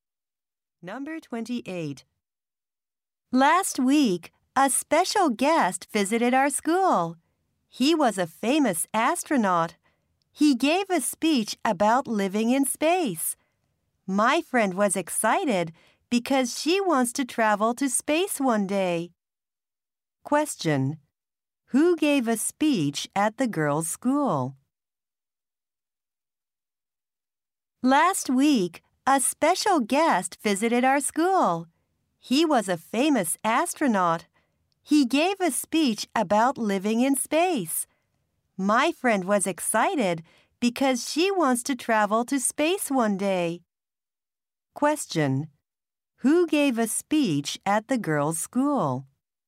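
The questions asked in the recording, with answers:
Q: Who gave a speech at the girls' school?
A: A famous astronaut.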